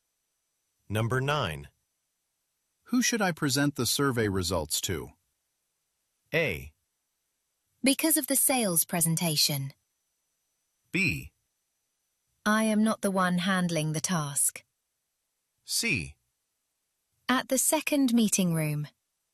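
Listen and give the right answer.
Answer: B: I am not the one handling the task.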